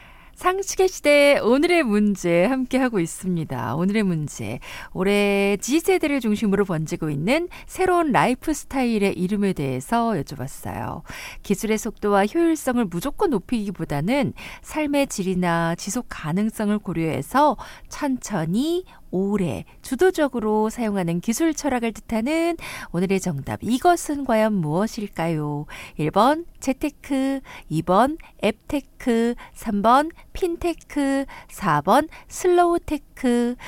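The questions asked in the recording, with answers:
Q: 기술의 속도와 효율성을 무조건 높이기보다는 삶의 질이나 지속 가능성을 고려해서 천천히 오래 주도적으로 사용하는 기술 철학을 뜻하는 오늘의 정답, 이것은 과연 무엇일까요?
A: 4번: 슬로우테크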